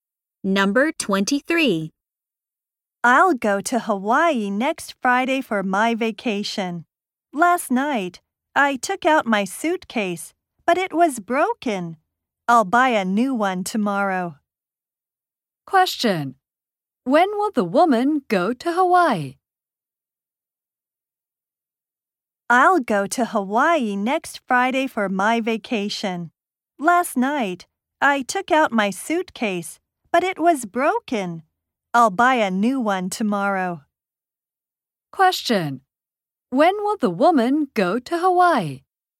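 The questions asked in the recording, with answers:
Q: When will the woman go to Hawaii?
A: Next Friday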